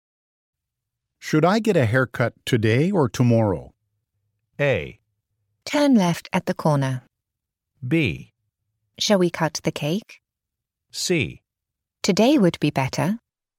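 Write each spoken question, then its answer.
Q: Should I get a haircut today or tomorrow?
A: C: Today would be better.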